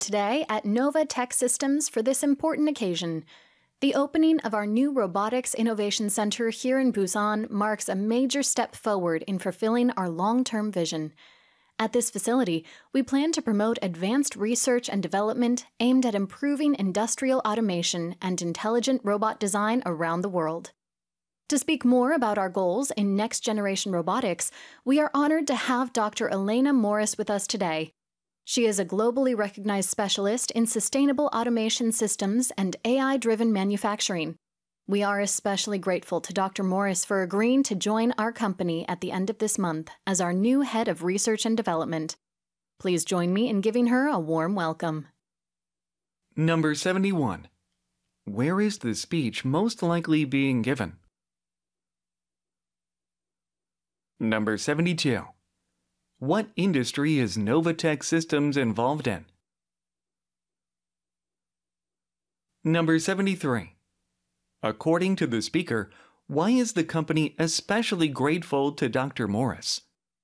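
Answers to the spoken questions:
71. At the opening of a new robotics innovation center in Busan
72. Robotics
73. She agreed to join the company as head of research and development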